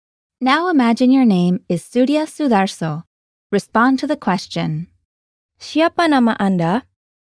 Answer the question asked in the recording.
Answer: Nama saya adalah Surya Sudarso.